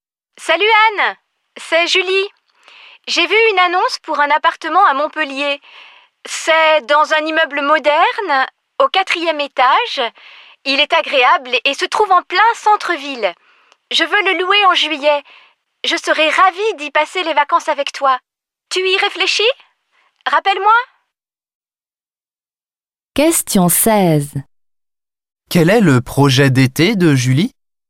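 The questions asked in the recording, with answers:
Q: Quel est le projet d'été de Julie?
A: Louer un appartement à Montpellier en juillet pour passer les vacances avec Anne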